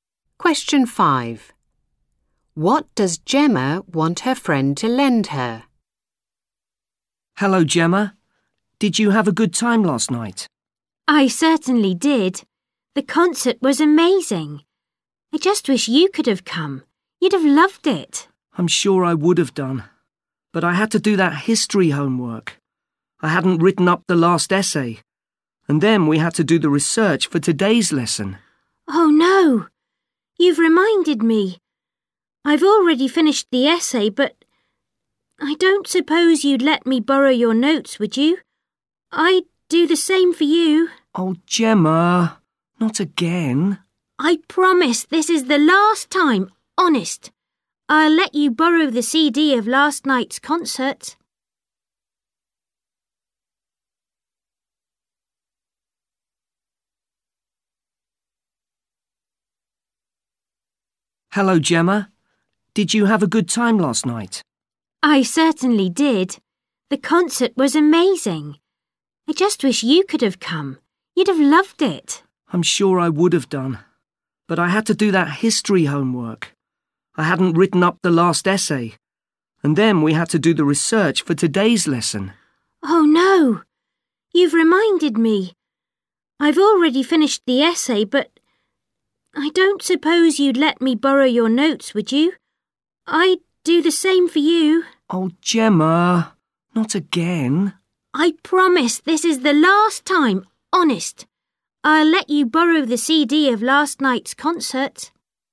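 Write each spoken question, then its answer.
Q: What does Gemma want her friend to lend her?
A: Her (history) notes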